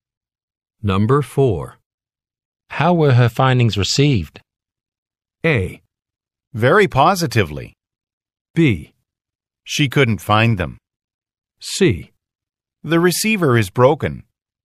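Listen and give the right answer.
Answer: A: Very positively.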